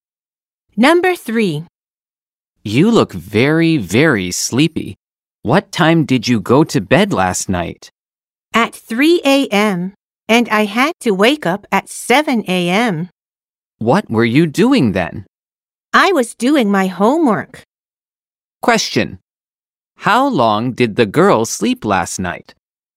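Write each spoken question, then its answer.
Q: How long did the girl sleep last night?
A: Four hours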